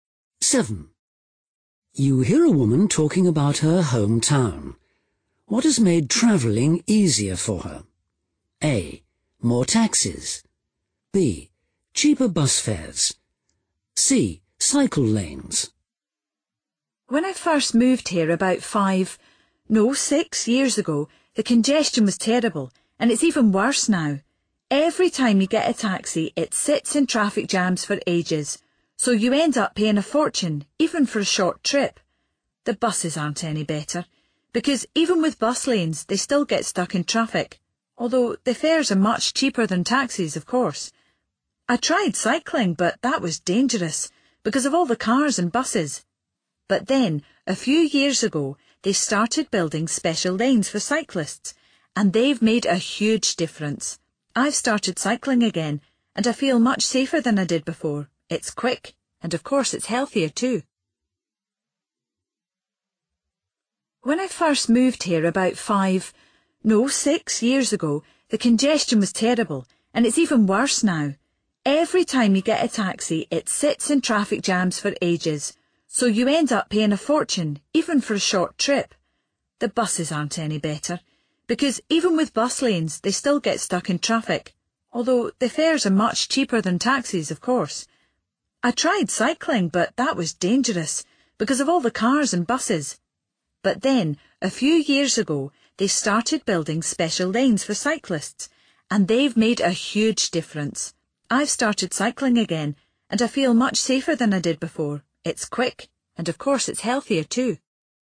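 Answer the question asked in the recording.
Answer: C: Cycle lanes.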